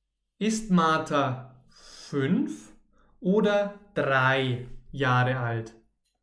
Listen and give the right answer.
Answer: Fünf. Martha ist 5 Jahre alt.